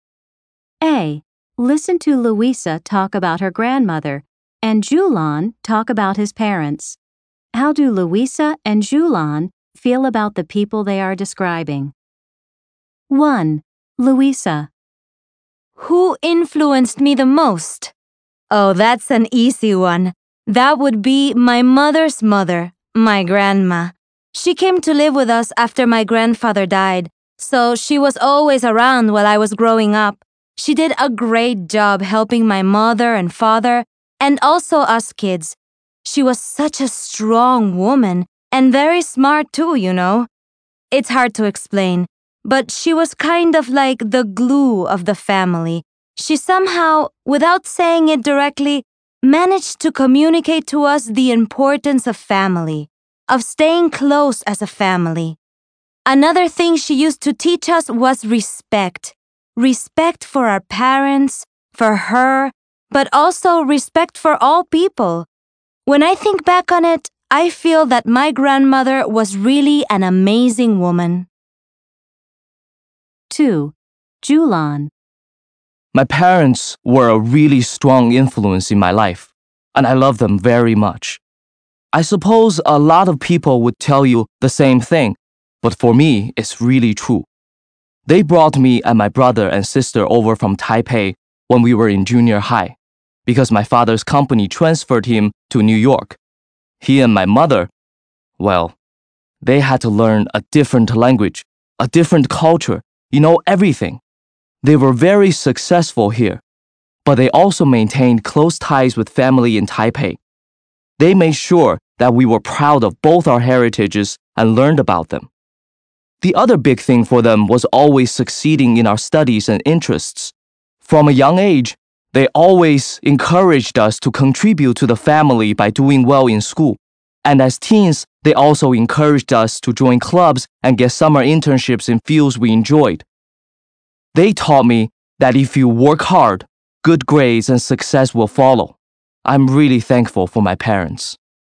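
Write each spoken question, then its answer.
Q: How do Louisa and Julian feel about the people they are describing?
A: Louisa admires her grandmother and thinks she was an amazing woman; Julian loves his parents and is thankful to them.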